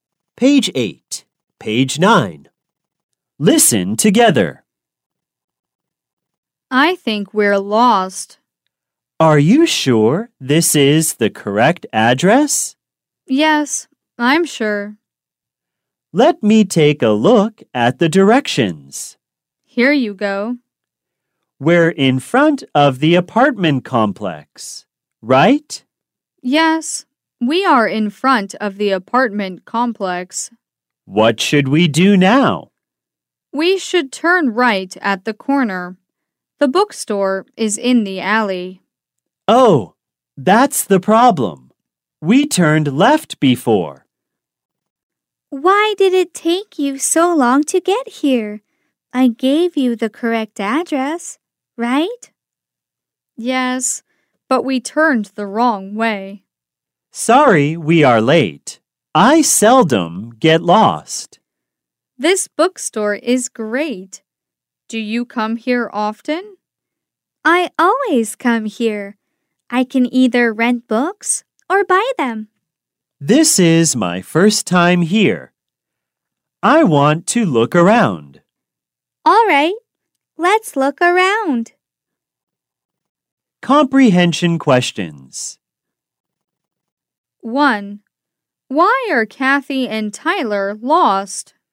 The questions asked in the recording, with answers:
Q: Why are Kathy and Tyler lost?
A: They are lost because they turned the wrong way.